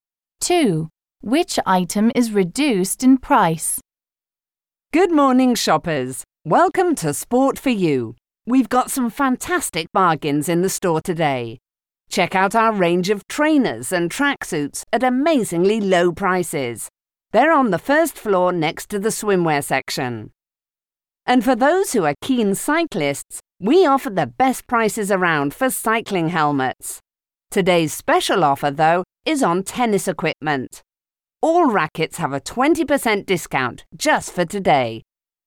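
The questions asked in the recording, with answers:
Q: Which item is reduced in price?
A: Tennis rackets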